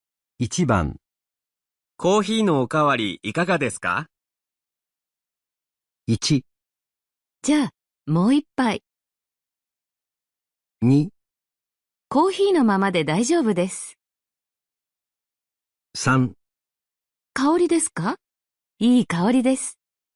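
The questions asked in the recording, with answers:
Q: コーヒーのおかわりいかがですか?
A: 1: じゃあ、もう一杯。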